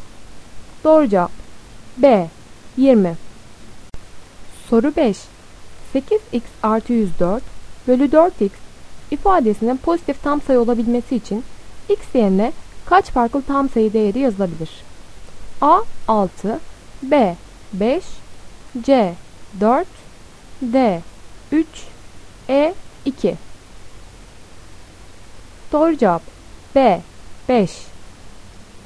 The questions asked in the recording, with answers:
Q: 8x artı 104 bölü 4x ifadesinin pozitif tam sayı olabilmesi için x yerine kaç farklı tam sayı değeri yazılabilir?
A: Doğru cevap B 5.